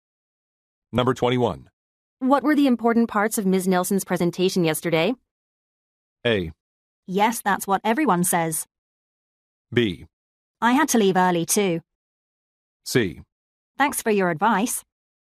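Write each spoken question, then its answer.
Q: What were the important parts of Ms.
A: B: I had to leave early too.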